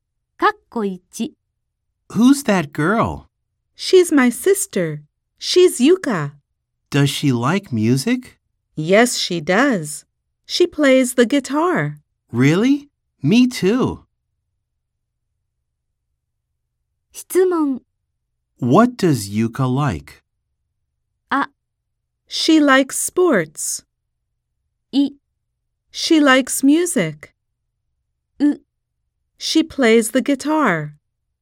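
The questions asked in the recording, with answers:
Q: What does Yuka like?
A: い: She likes music.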